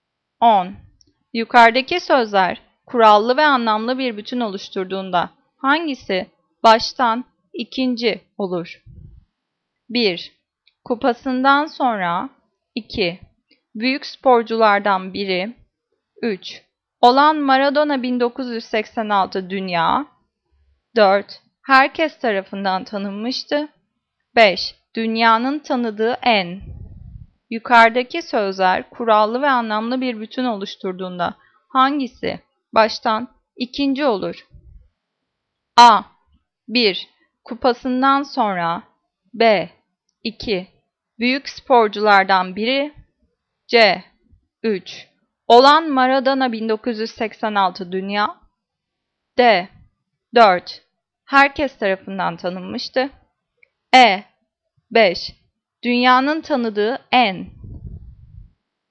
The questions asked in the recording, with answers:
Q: Yukarıdaki sözler kurallı ve anlamlı bir bütün oluşturduğunda hangisi baştan ikinci olur?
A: Cevap B. 2. Büyük sporculardan biri.